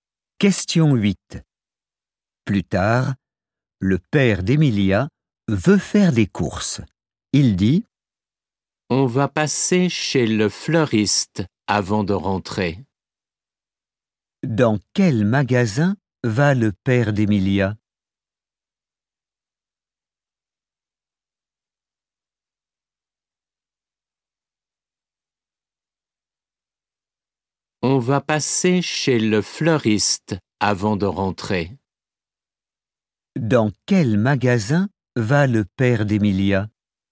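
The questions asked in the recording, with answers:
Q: Dans quel magasin va le père d'Emilia?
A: Chez le fleuriste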